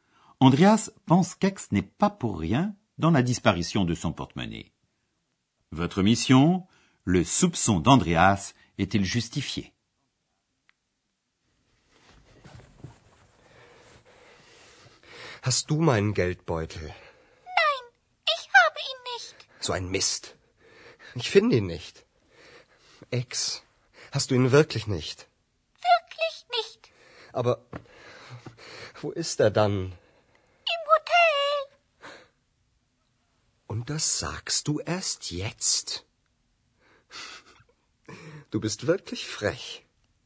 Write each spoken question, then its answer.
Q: le soupçon d'Andreas est-il justifié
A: Ainsi, ce n'est pas X qui a fait disparaître le porte-monnaie.